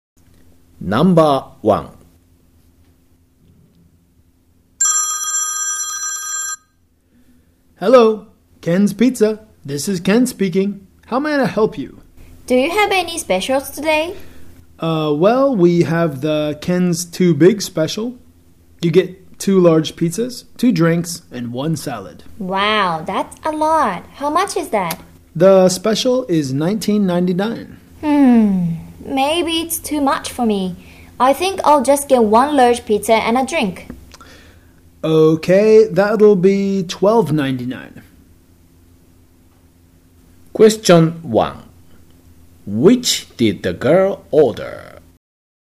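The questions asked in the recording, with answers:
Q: Which did the girl order?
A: One large pizza and a drink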